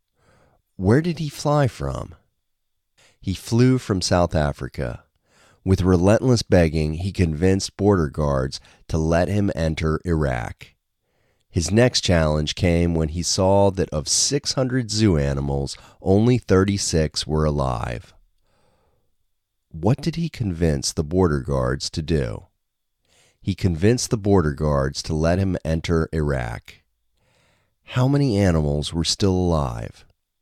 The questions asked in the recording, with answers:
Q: How many animals were still alive?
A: 36 animals were still alive.